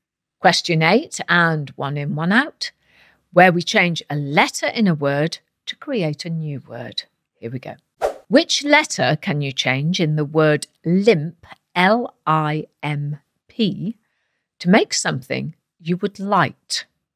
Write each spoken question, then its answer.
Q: Which letter can you change in the word limp, L-I-M-P, to make something you would like?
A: Well, if you change the letter I for a letter A, you get the word lamp.